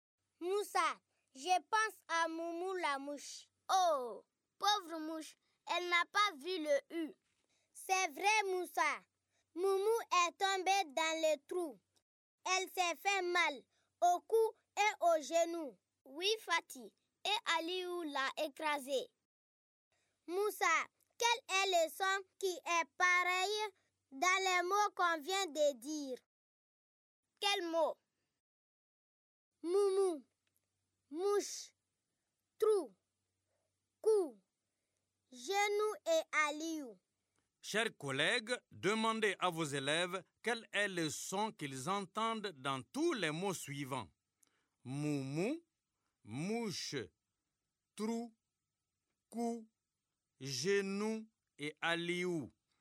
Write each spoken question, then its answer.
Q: Chers collègues, demandez à vos élèves quel est le son qu'ils entendent dans tous les mots suivants.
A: j'espère que vos élèves ont trouvé le son où.